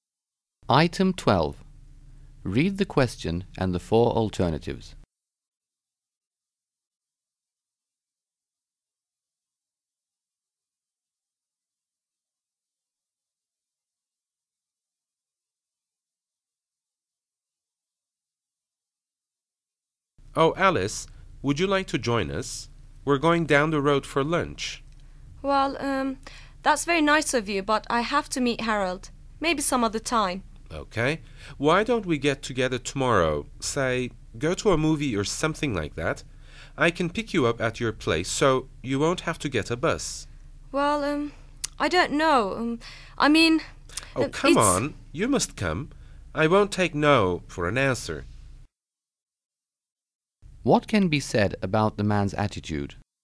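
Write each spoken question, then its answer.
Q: What can be said about the man's attitude?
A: He is insistent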